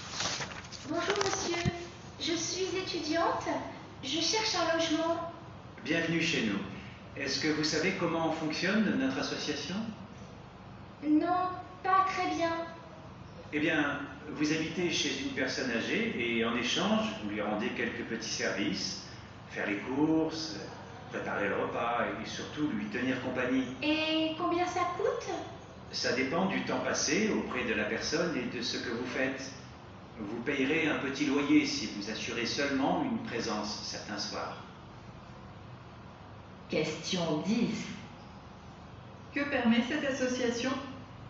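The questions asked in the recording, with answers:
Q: Que permet cette association?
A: De loger un étudiant chez une personne âgée en échange de petits services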